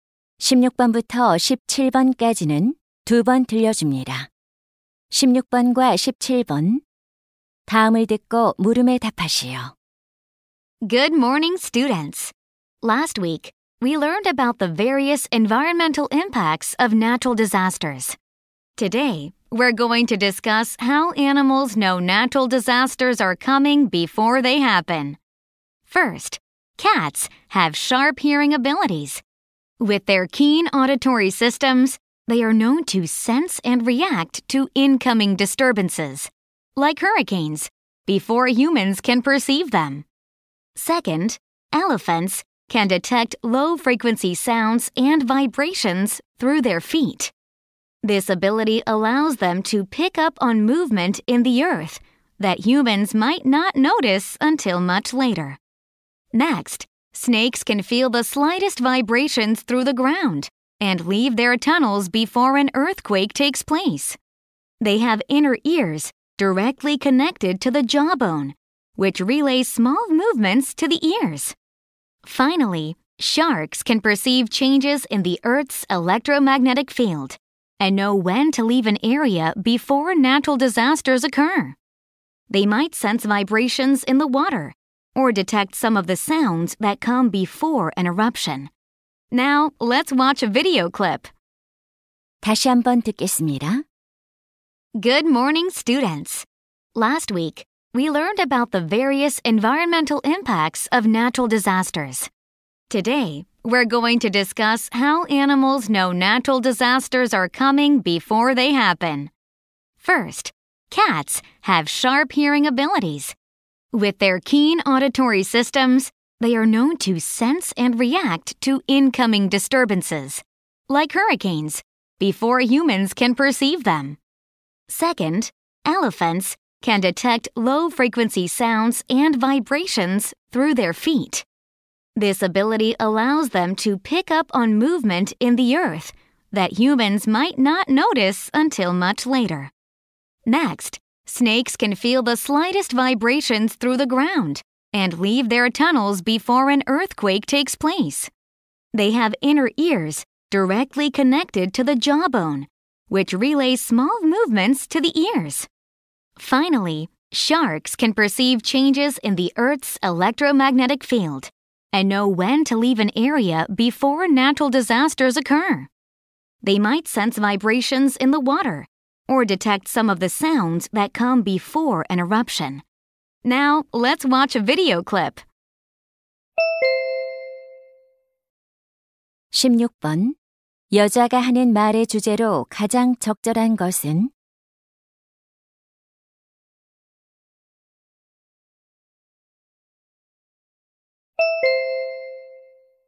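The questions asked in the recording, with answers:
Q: 여자가 하는 말의 주제로 가장 적절한 것은?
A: 동물들이 자연재해를 미리 감지하는 방법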